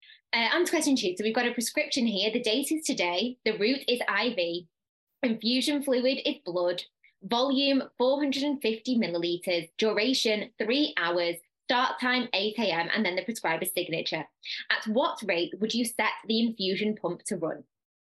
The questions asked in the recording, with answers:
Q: At what rate would you set the infusion pump to run?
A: that will give you 150 mils per hour